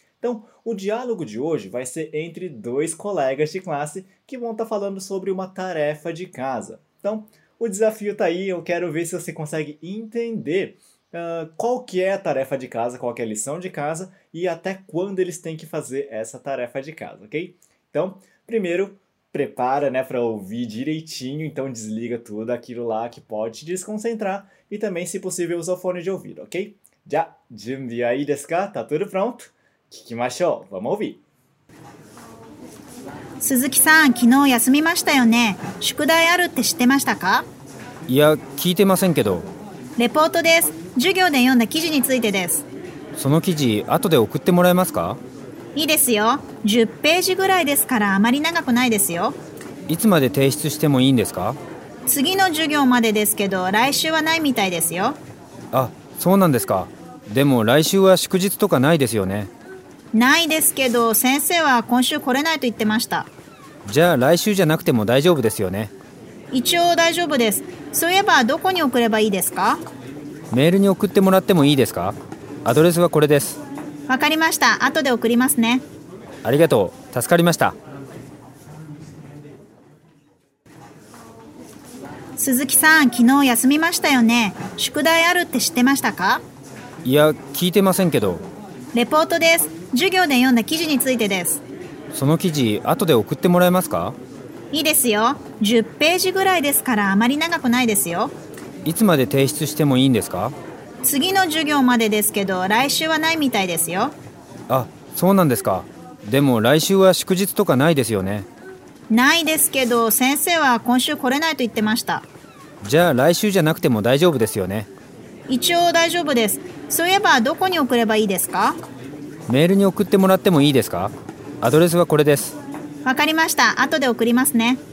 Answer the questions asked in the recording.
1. É um relatório sobre o artigo que nós lemos durante a aula.
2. olha, é até a próxima aula, mas semana que vem não vai ter aula.